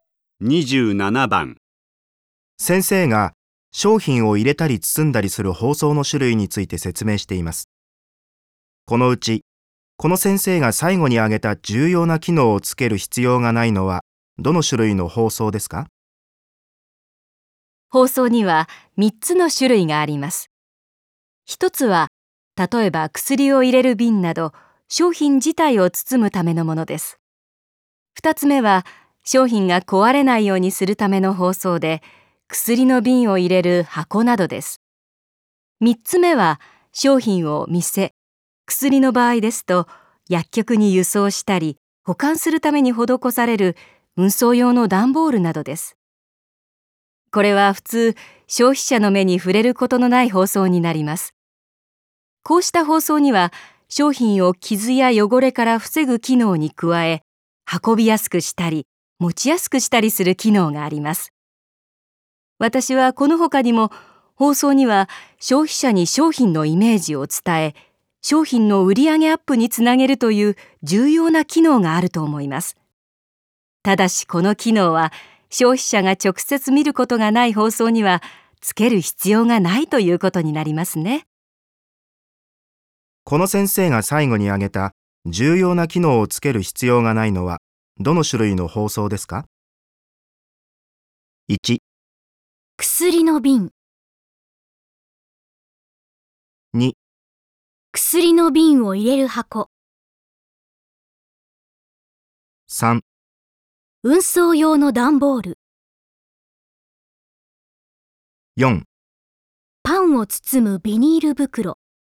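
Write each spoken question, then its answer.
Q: この先生が最後に挙げた重要な機能をつける必要がないのは、どの種類の包装ですか?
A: 3: 運送用の段ボール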